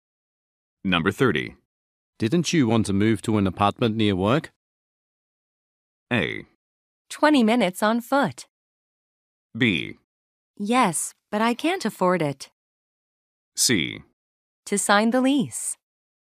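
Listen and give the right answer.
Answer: B: Yes, but I can't afford it.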